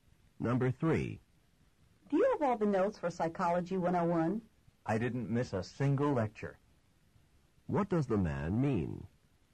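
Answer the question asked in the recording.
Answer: He has all the notes; he attended every lecture.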